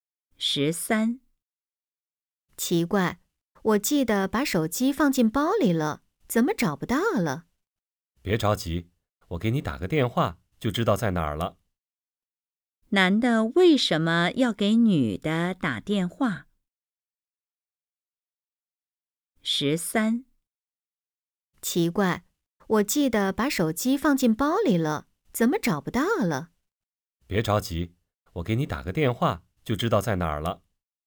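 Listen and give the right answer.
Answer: 帮她找手机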